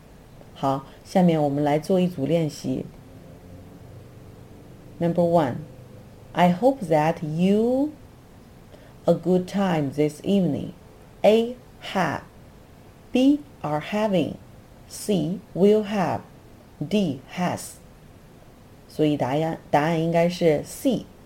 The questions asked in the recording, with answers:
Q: I hope that you a good time this evening.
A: 所以答案应该是 C.